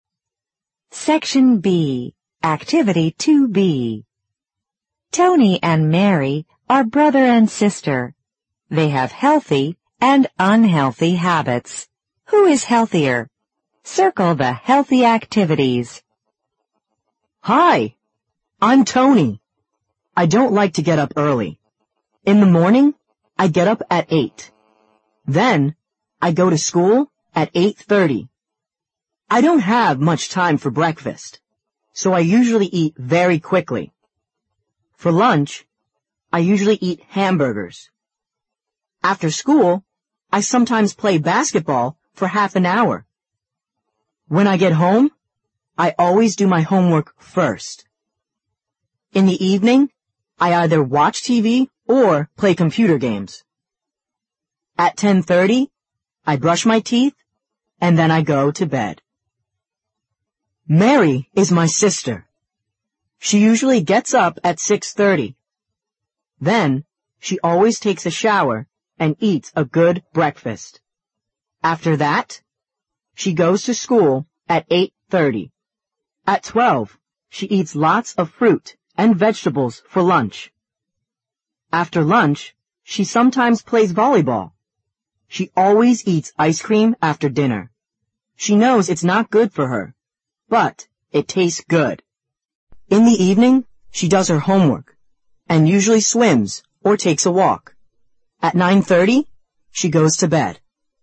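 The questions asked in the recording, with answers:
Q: Who is healthier?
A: Mary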